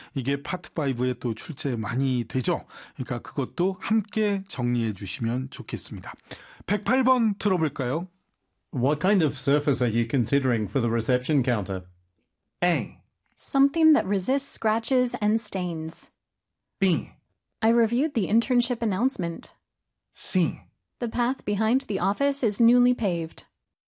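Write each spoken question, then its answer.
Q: What kind of surface are you considering for the reception counter?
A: A: Something that resists scratches and stains.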